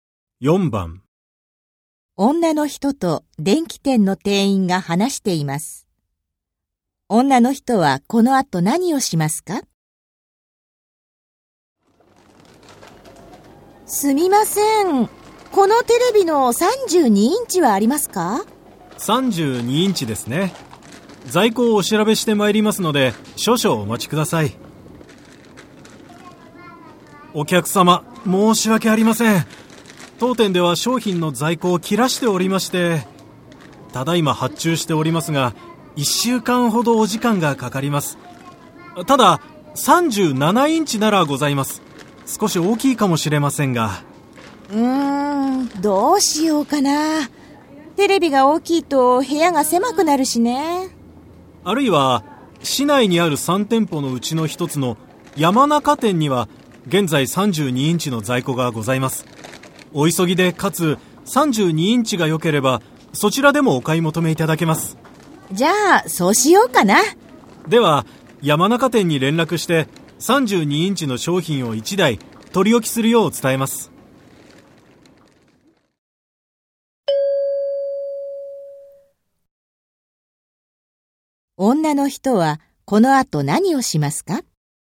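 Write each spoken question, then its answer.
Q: 女の人はこの後何をしますか?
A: 山中店へ行って32インチのテレビを買う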